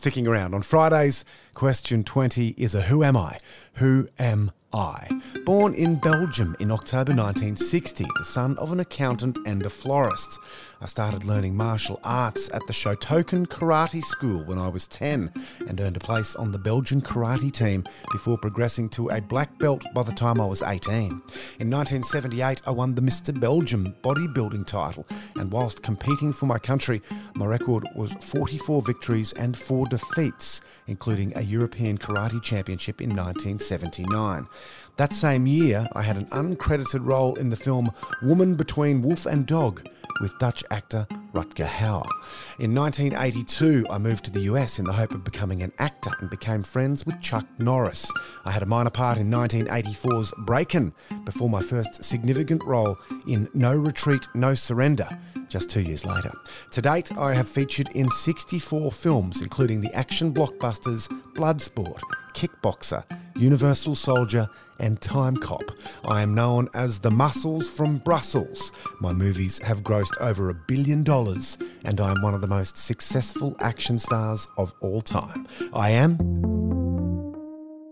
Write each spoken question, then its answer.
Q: Who am I?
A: I am Jean-Claude Van Damme.